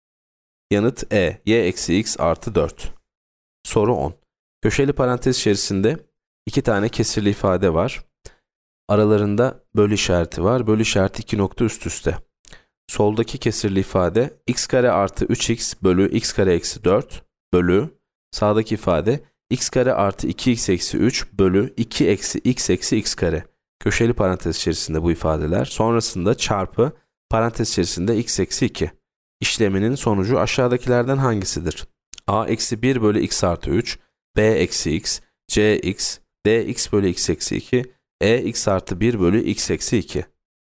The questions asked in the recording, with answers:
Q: İşleminin sonucu aşağıdakilerden hangisidir?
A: Yanıt B eksi x.